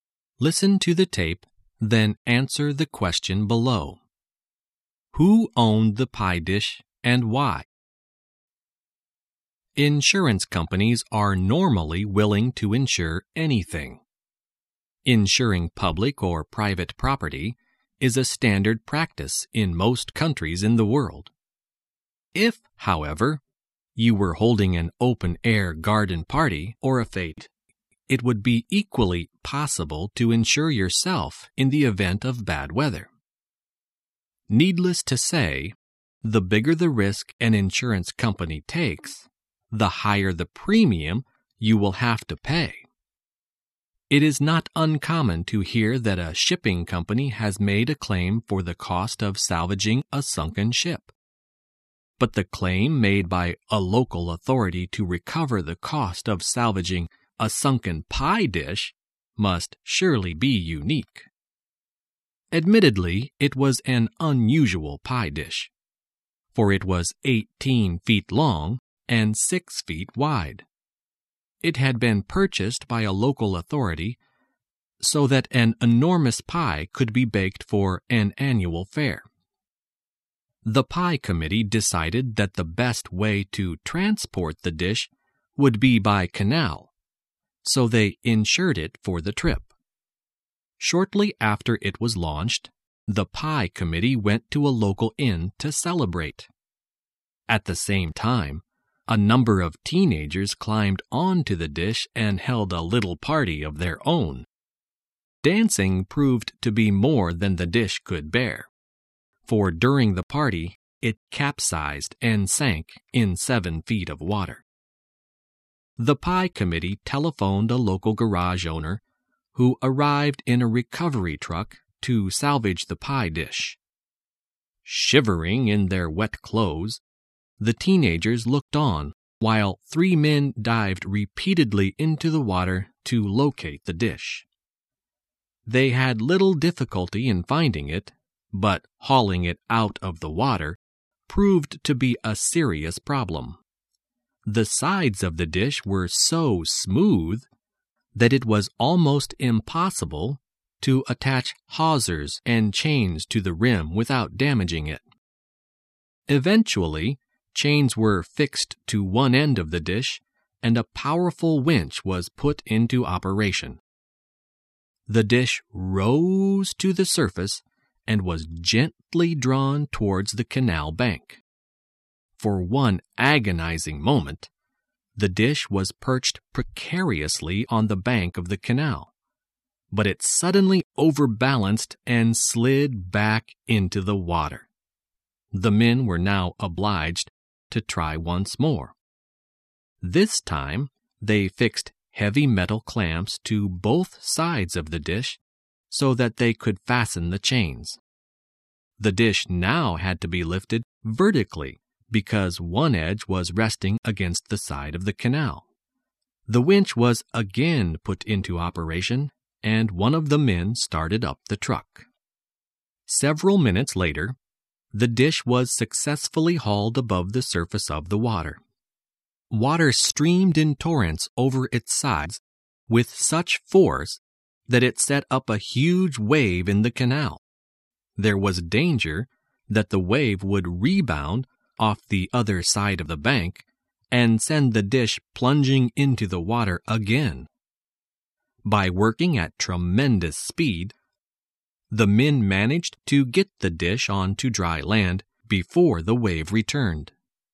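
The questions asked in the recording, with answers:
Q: Who owned the pie dish and why?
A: A local authority owned it; it bought the dish so an enormous pie could be baked for an annual fair.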